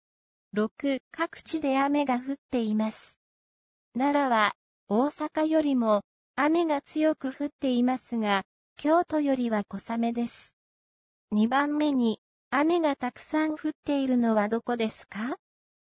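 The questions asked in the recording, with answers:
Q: 2番目に雨がたくさん降っているのはどこですか?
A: 奈良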